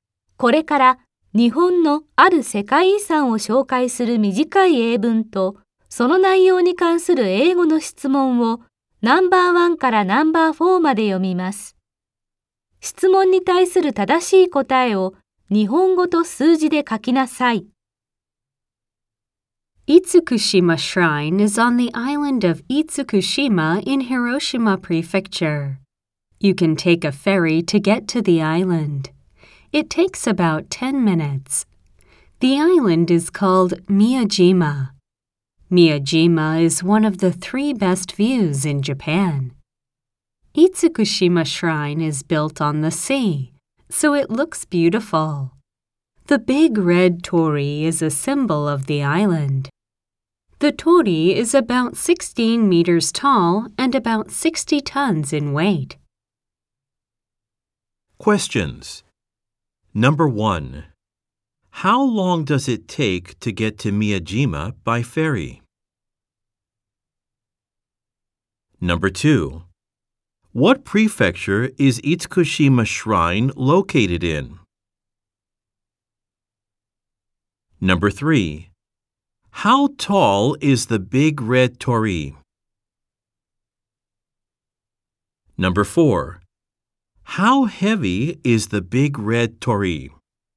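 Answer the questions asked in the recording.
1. 約10分
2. 広島県
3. 約16メートル
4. 約60トン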